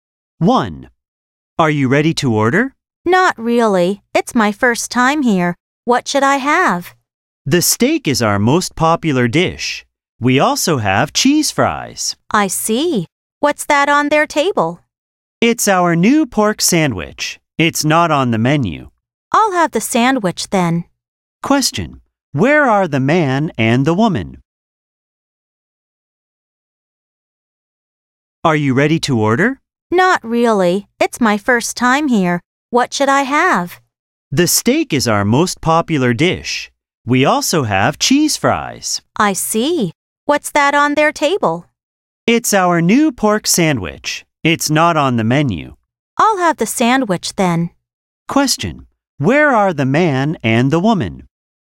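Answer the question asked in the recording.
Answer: In a restaurant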